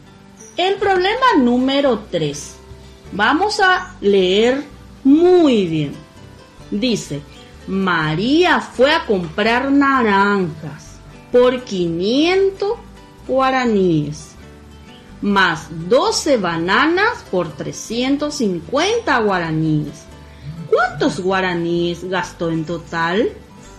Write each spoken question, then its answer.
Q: ¿Cuántos guaraníes gastó en total?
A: La respuesta sería: gastó en total 850 guaníes.